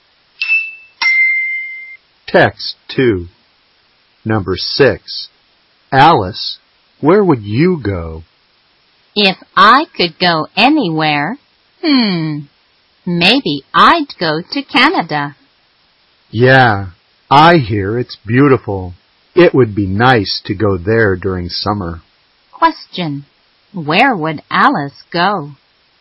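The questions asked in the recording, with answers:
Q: Question, where would Alice go?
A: Canada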